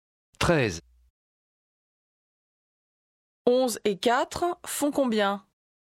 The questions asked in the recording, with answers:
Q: 11 et 4 font combien?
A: 15.